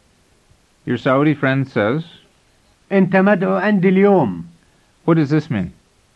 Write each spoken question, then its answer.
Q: What does this mean?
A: It means, you're invited to my house today.